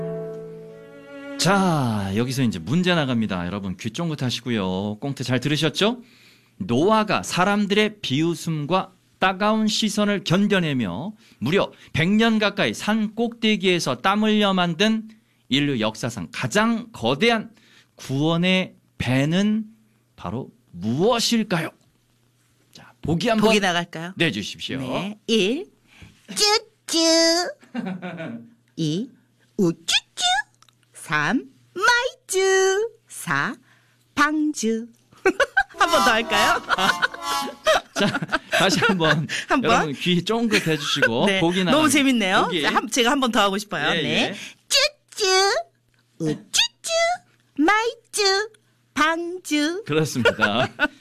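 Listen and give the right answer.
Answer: 4: 방주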